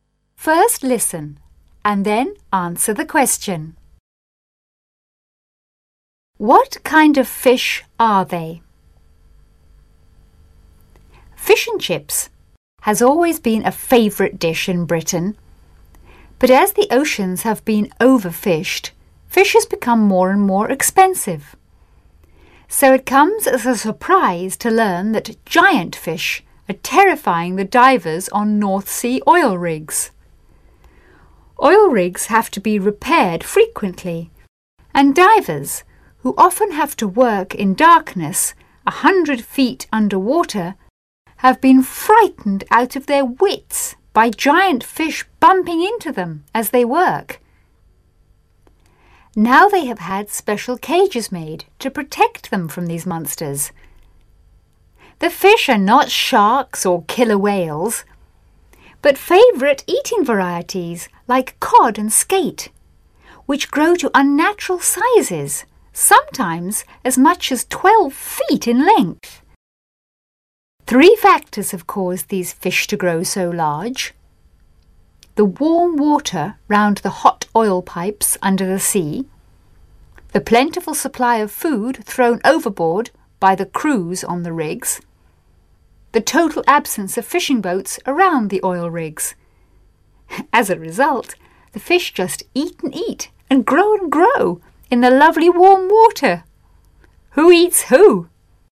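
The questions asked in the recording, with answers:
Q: What kind of fish are they?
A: Favourite eating varieties like cod and skate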